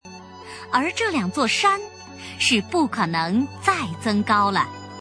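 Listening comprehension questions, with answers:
★音声を聞き、空欄〇に当てはまる単語を探して、授業内課題用紙に漢字とピンインを書いてください。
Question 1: 而这两座山是不〇〇再增高了。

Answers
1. 可能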